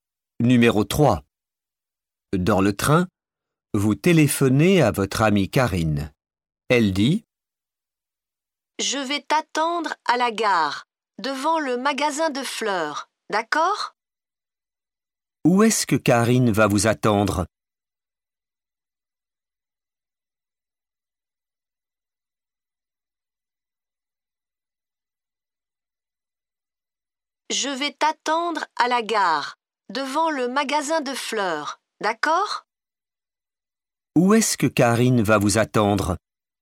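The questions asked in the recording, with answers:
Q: Où est-ce que Karine va vous attendre ?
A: À la gare, devant le magasin de fleurs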